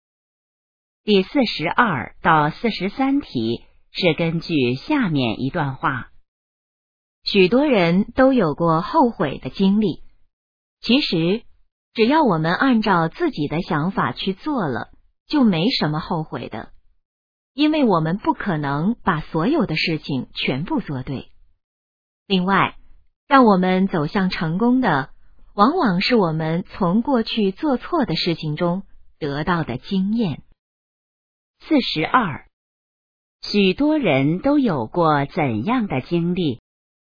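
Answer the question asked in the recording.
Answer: 后悔的经历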